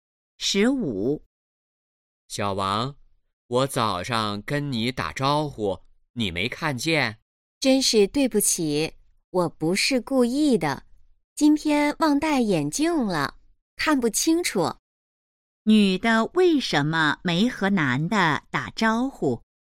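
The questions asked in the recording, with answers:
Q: 女的为什么没和男的打招呼?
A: 忘戴眼镜,看不清楚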